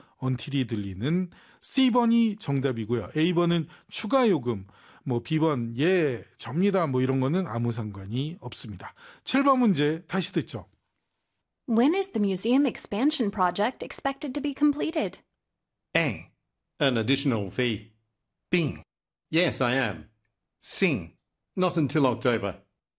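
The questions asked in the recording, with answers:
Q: When is the museum expansion project expected to be completed?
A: C: Not until October.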